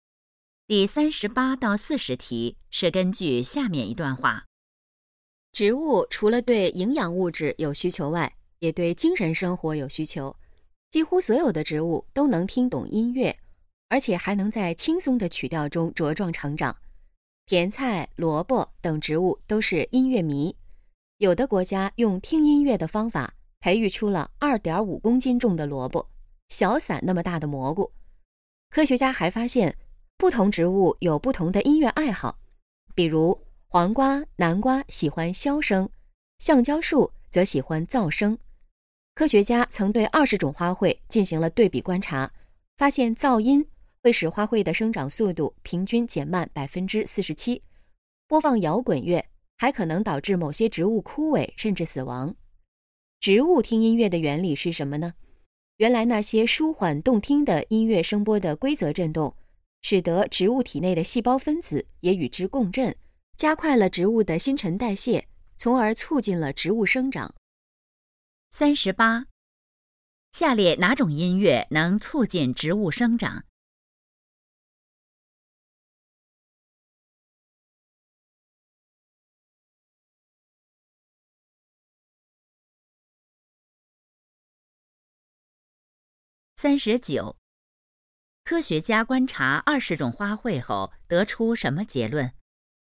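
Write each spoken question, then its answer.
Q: 下列哪种音乐能促进植物生长?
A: 轻松舒缓的音乐

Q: 科学家观察20种花卉后得出什么结论?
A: 噪音会使花卉生长速度平均减慢47%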